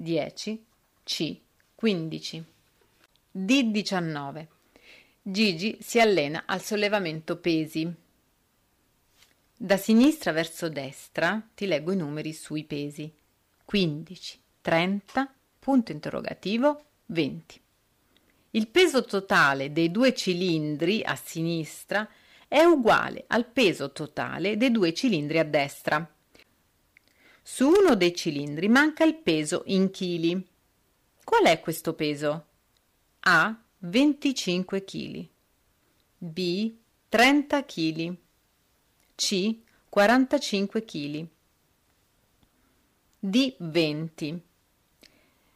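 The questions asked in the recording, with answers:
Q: Qual è questo peso?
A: A: 25 kg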